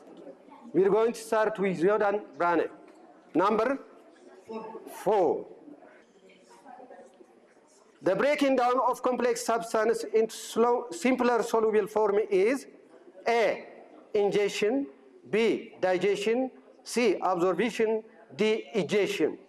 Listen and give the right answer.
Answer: B, digestion.